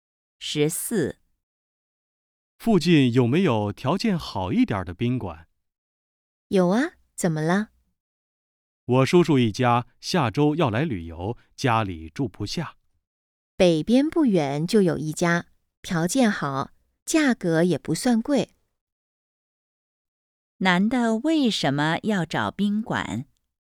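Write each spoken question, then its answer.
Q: 男的为什么要找宾馆?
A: 叔叔一家来旅游,家里住不下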